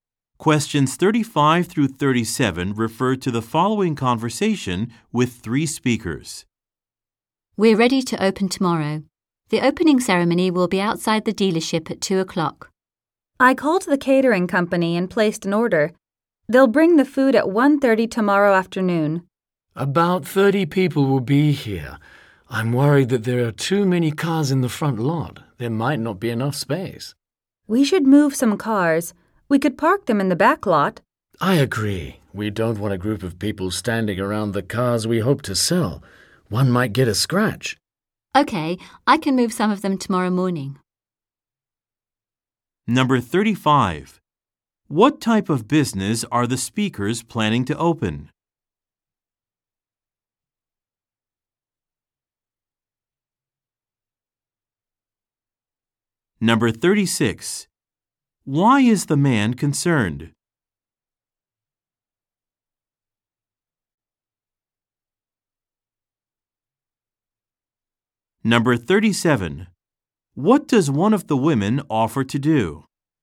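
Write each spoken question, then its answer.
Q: What type of business are the speakers planning to open?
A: A car dealership

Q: Why is the man concerned?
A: There are too many cars in the front lot, so there may not be enough space

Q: What does one of the women offer to do?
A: Move some cars tomorrow morning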